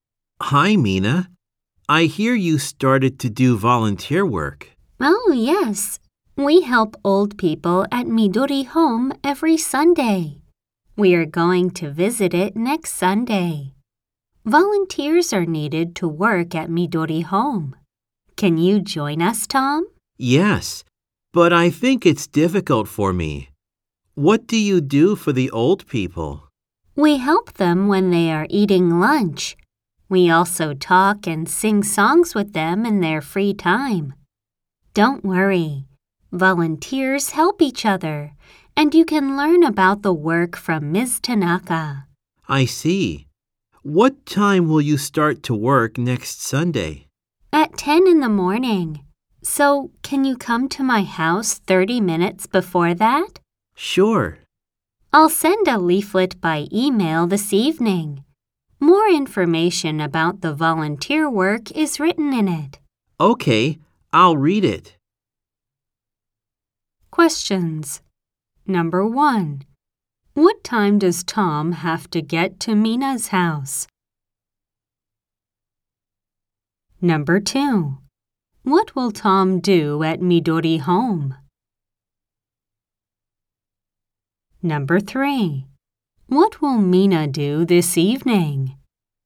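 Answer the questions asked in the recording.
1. At 9:30 in the morning.
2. He will help old people eat lunch and talk and sing songs with them.
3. She will send Tom a leaflet by email.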